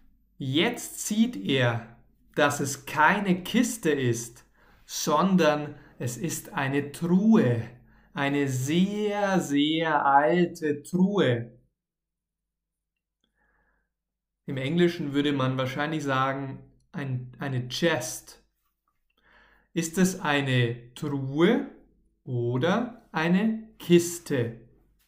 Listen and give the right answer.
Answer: Eine Truhe. Es ist eine Truhe, keine Kiste.